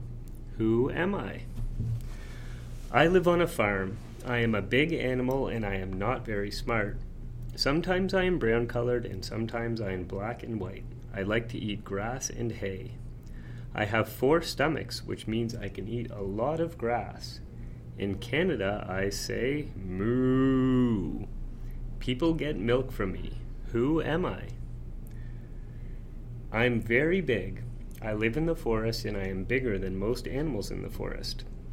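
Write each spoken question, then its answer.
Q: Who am I?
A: a cow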